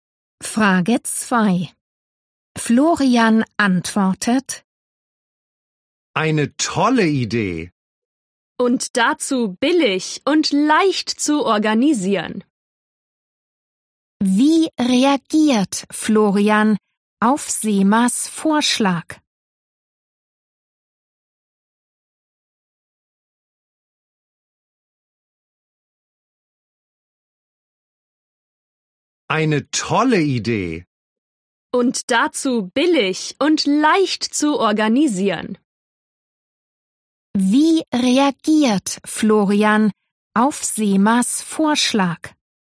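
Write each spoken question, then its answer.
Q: Wie reagiert Florian auf Semas Vorschlag?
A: Er findet die Idee toll, billig und leicht zu organisieren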